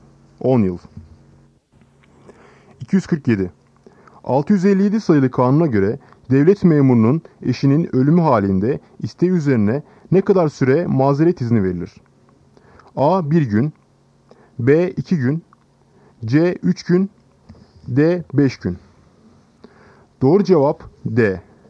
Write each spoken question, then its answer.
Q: 657 sayılı kanuna göre devlet memurunun eşinin ölümü halinde isteği üzerine ne kadar süre mazeret izni verilir?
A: Doğru cevap D. 5 gün.